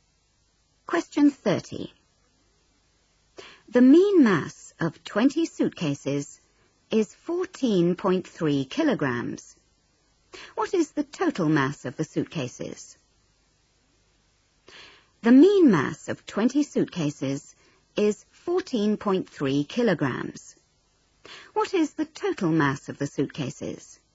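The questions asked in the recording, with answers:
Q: What is the total mass of the suitcases?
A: 286 kg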